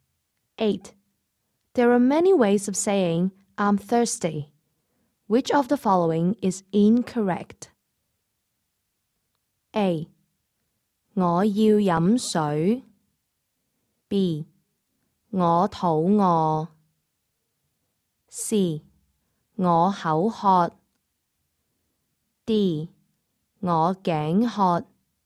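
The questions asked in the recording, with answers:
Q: Which of the following is incorrect?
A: B: 我肚饿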